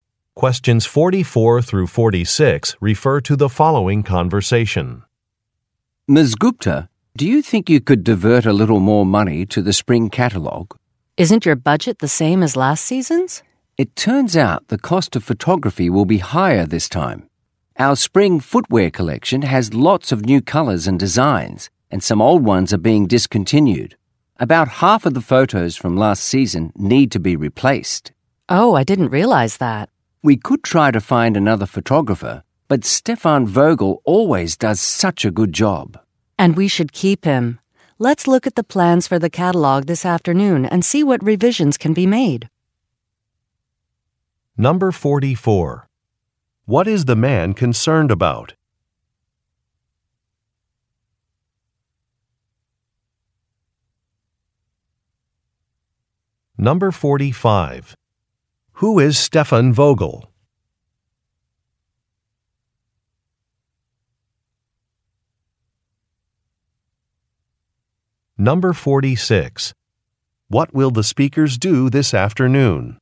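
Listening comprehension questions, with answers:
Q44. What is the man concerned about?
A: A project budget

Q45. Who is Stefan Vogel?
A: A photographer

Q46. What will the speakers do this afternoon?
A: Review some plans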